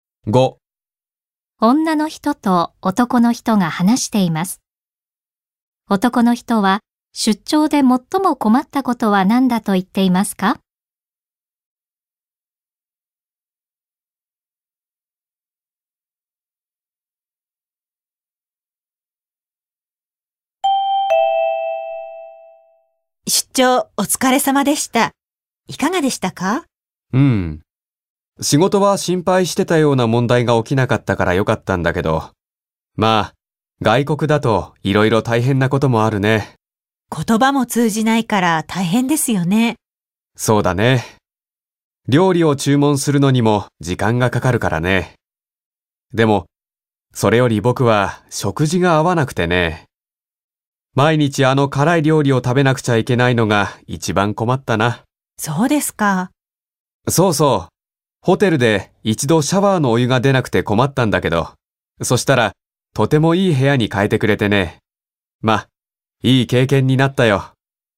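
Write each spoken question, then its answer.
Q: 男の人は出張で最も困ったことは何だと言っていますか?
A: 食事が合わなかったこと(毎日辛い料理を食べなければならなかったこと)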